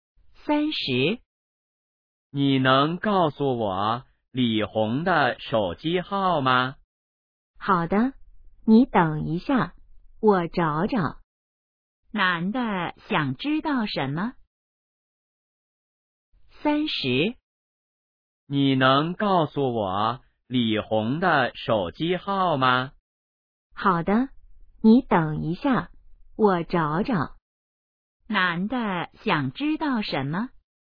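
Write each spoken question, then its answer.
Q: 男的想知道什么?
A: 李红的手机号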